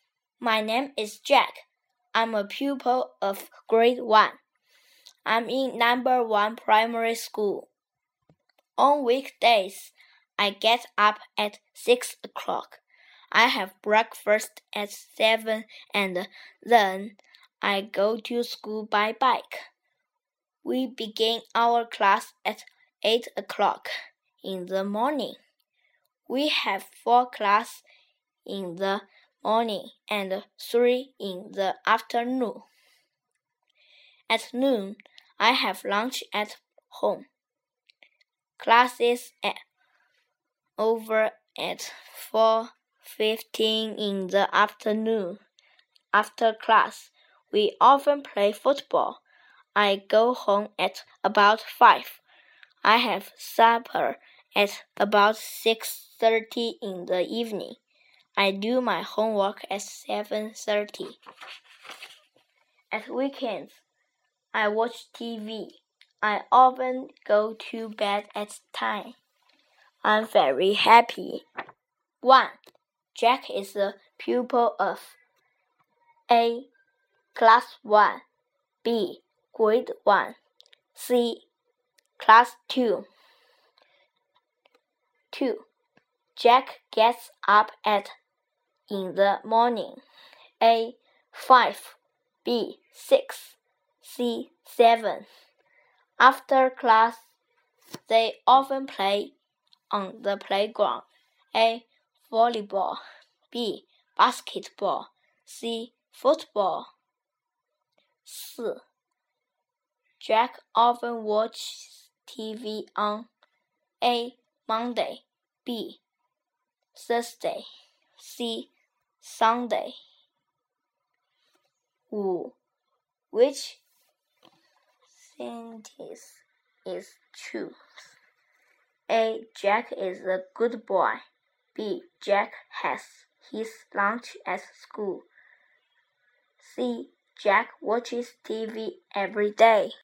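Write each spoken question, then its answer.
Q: Jack is a pupil of A.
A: B: Grade 1

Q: Jack gets up at in the morning.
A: B: 6

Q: After class, they often play on the playground.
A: C: football

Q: Jack often watches TV on a Monday, b Thursday, c Sunday.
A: C: Sunday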